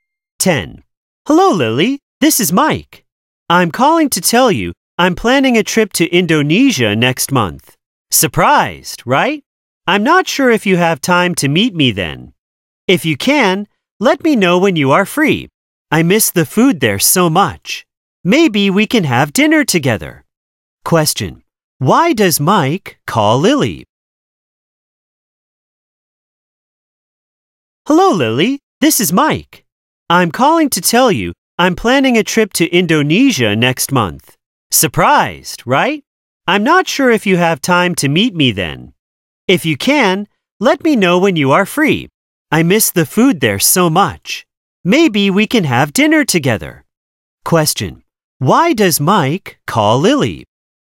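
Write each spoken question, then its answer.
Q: Why does Mike call Lily?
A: To tell her he's visiting Indonesia and ask to meet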